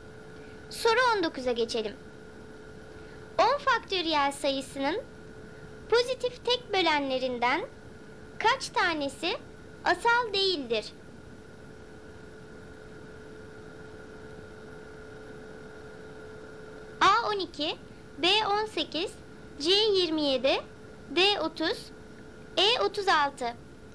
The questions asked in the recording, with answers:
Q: 10 faktöriyel sayısının pozitif tek bölenlerinden kaç tanesi asal değildir?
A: Doğru cevap C 27.